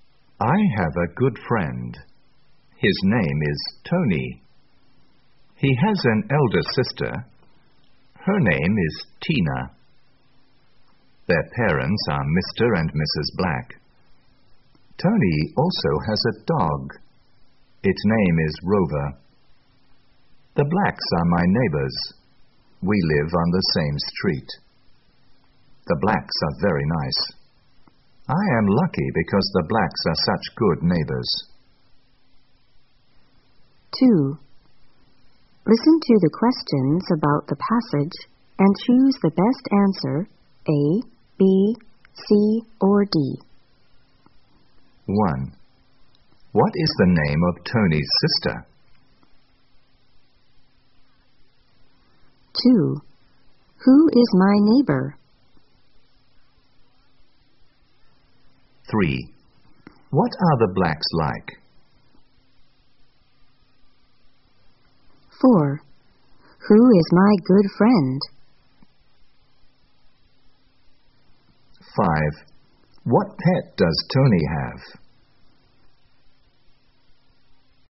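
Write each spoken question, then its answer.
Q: What is the name of Tony's sister?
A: Tina

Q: Who is my neighbor?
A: The Blacks

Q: What are the Blacks like?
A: Very nice

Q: Who is my good friend?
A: Tony

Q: What pet does Tony have?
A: A dog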